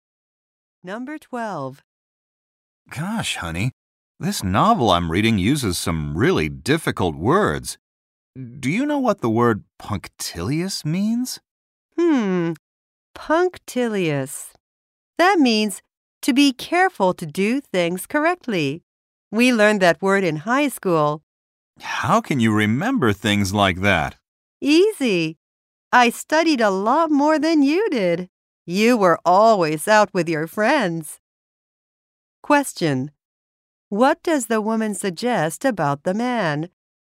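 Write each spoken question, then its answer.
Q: What does the woman suggest about the man?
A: He didn't study as much as she did in high school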